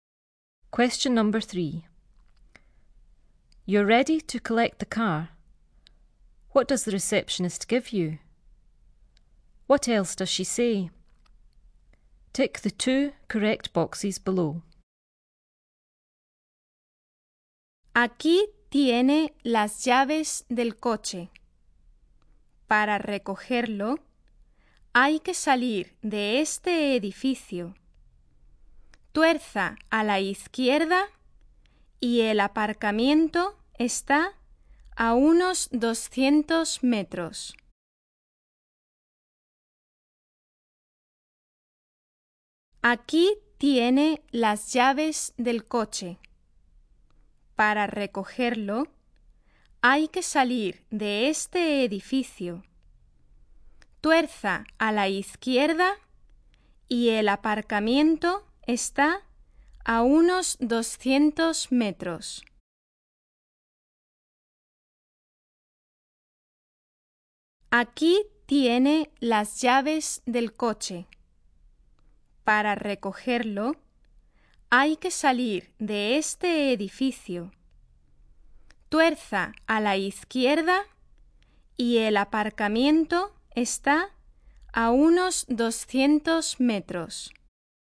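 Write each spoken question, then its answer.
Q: What does the receptionist give you?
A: The car keys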